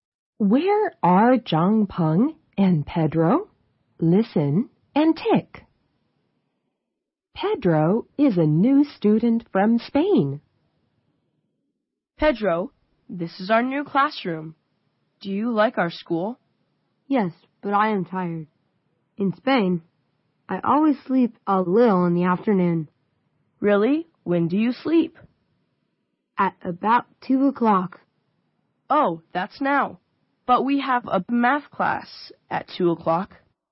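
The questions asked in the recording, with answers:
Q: Where are Zhang Peng and Pedro?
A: In their new classroom at school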